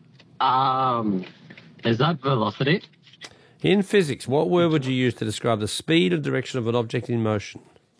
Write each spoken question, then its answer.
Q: In physics, what word would you use to describe the speed and direction of an object in motion?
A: Velocity is correct.